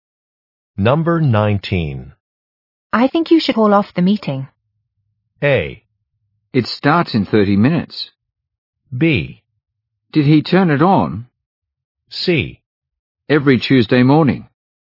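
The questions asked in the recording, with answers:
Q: I think you should call off the meeting.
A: A: It starts in 30 minutes.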